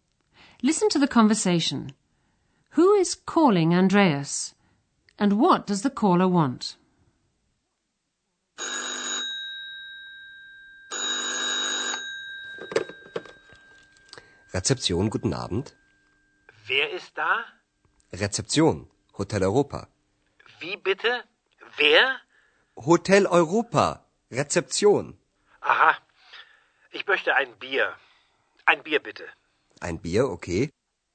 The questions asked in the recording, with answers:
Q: And what does the caller want?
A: The caller asks Andreas for a beer.